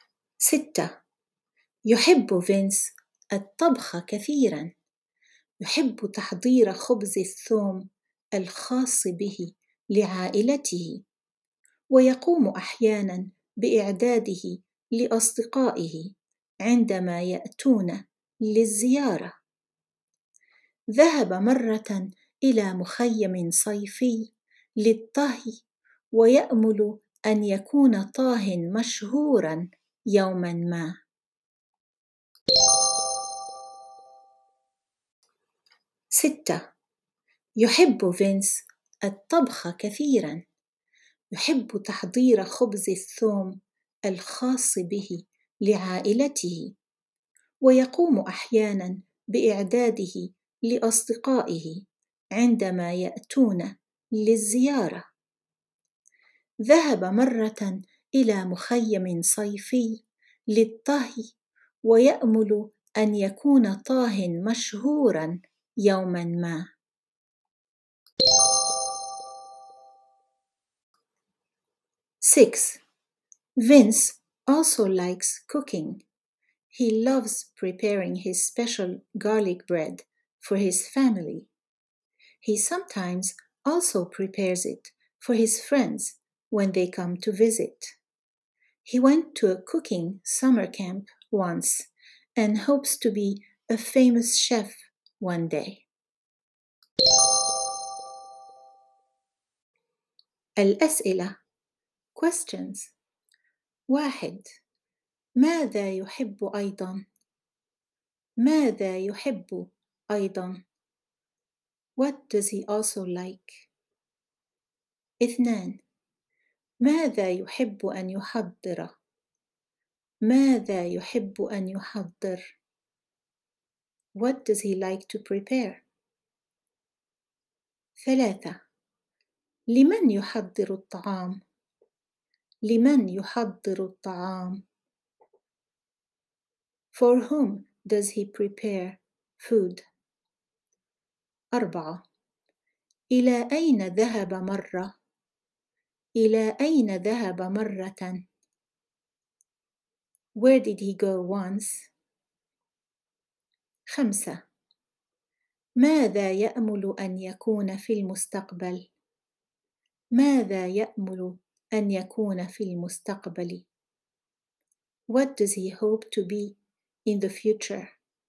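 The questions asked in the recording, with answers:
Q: ماذا يحب أيضا؟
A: الطبخ

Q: ماذا يحب أن يحضر؟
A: خبز الثوم الخاص به

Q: لمن يحضر الطعام؟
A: لعائلته وأحيانا لأصدقائه

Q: إلى أين ذهب مرة؟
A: إلى مخيم صيفي للطهي

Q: ماذا يأمل أن يكون في المستقبل؟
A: طاهيا مشهورا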